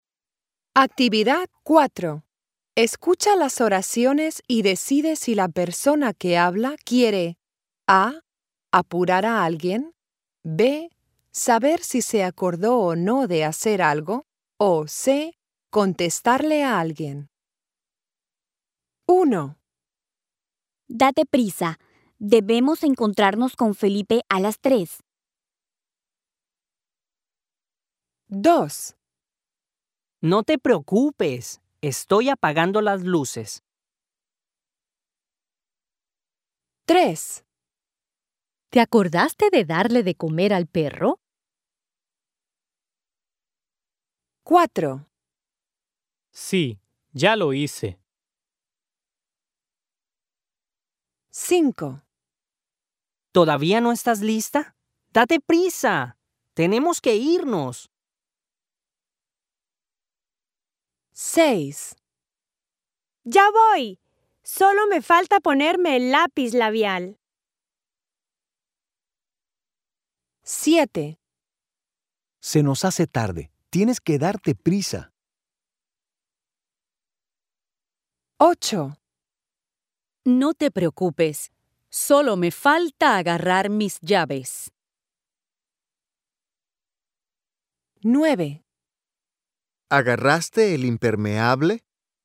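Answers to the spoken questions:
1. A: apurar a alguien
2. C: contestarle a alguien
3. B: saber si se acordó o no de hacer algo
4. C: contestarle a alguien
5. A: apurar a alguien
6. C: contestarle a alguien
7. A: apurar a alguien
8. C: contestarle a alguien
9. B: saber si se acordó o no de hacer algo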